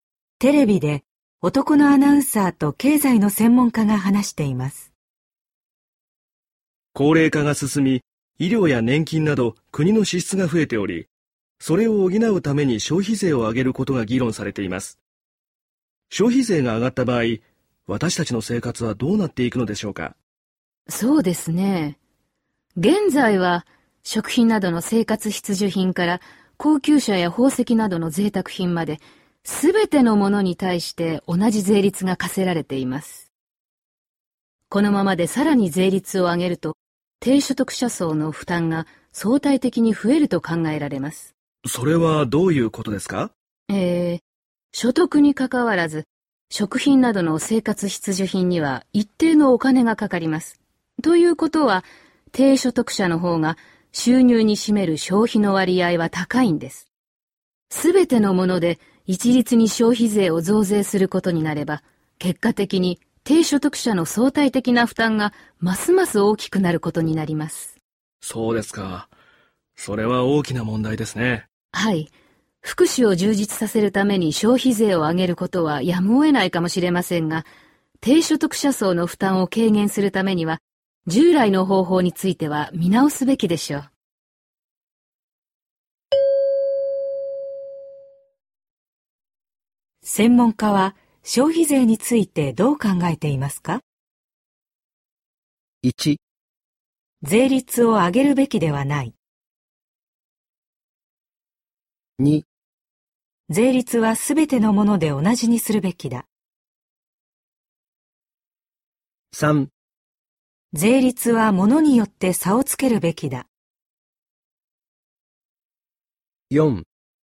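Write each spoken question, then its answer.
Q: 専門家は消費税についてどう考えていますか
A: 3: 税率は物によって差をつけるべきだ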